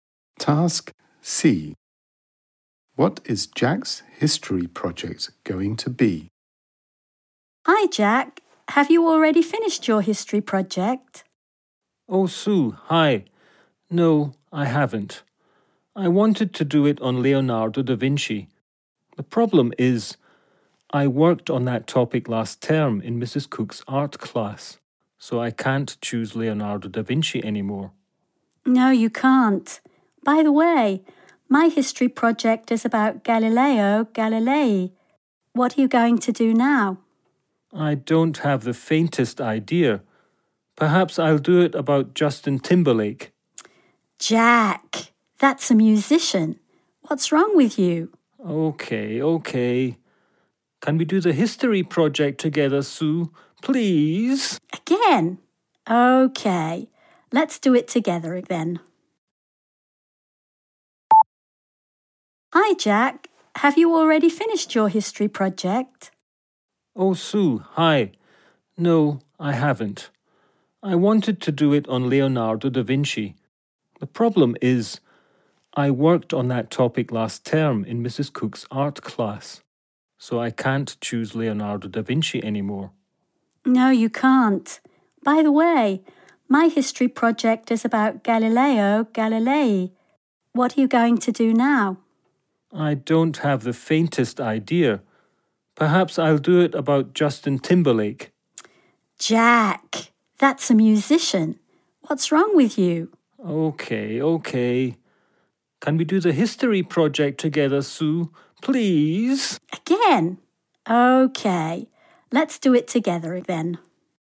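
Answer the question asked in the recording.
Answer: Galileo Galilei (with Sue)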